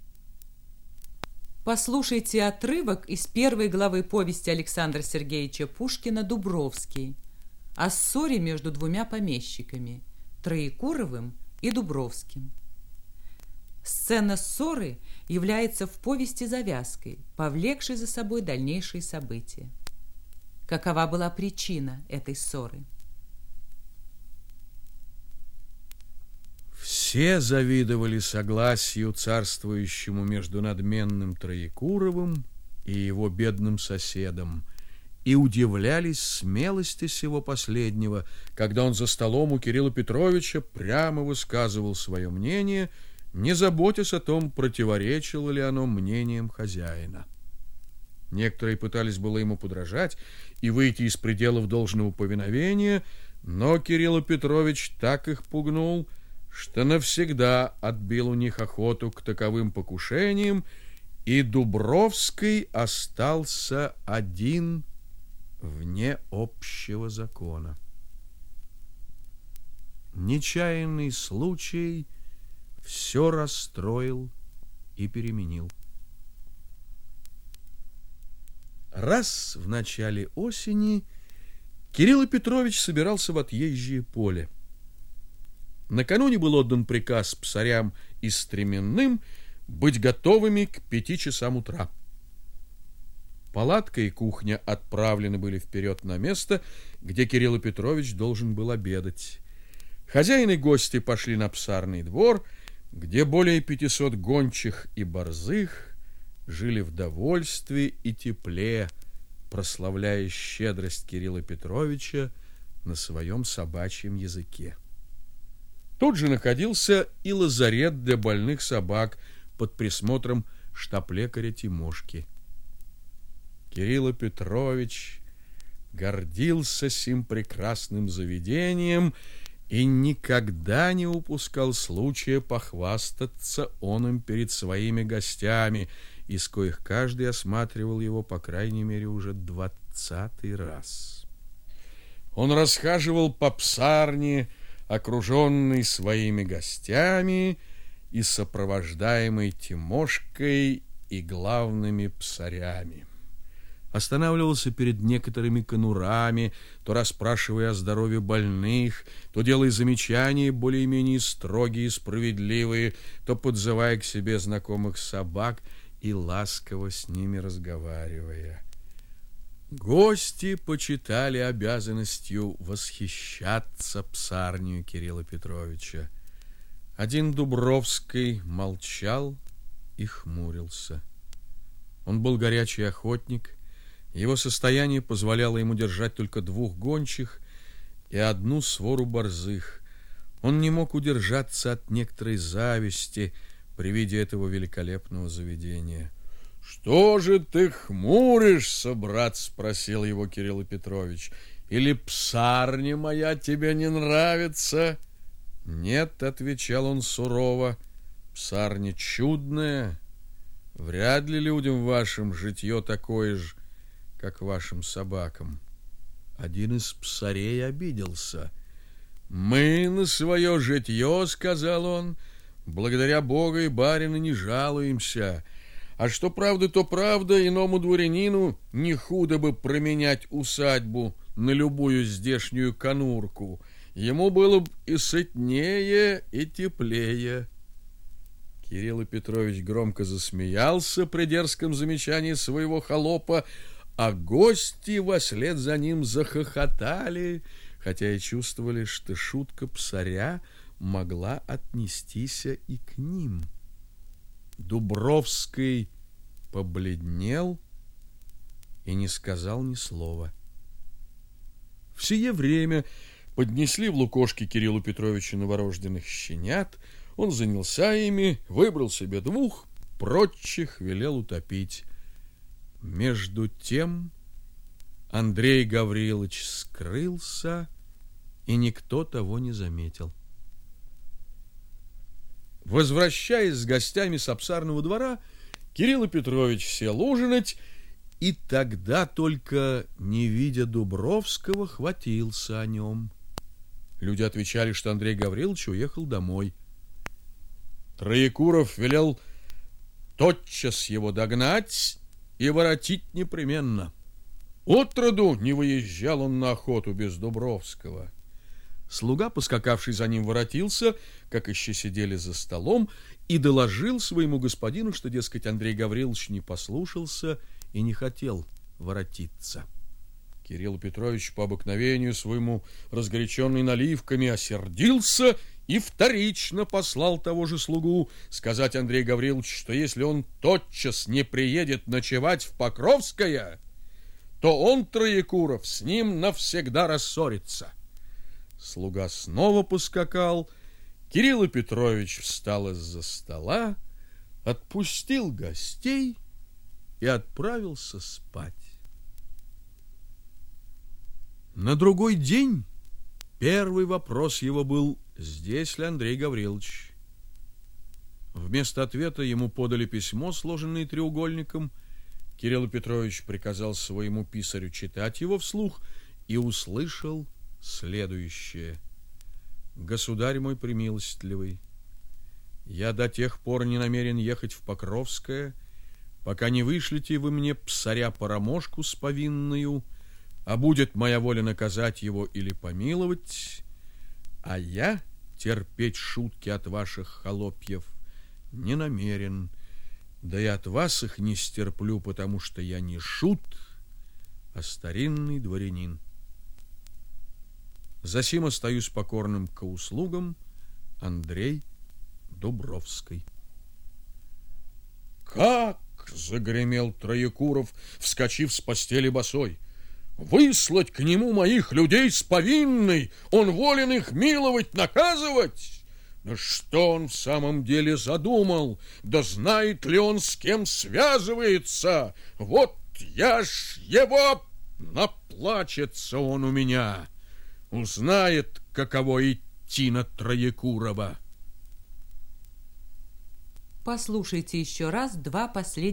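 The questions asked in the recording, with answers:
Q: Какова была причина этой ссоры?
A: Дерзкая шутка псаря Троекурова, оскорбившая Дубровского (над которой засмеялся Троекуров)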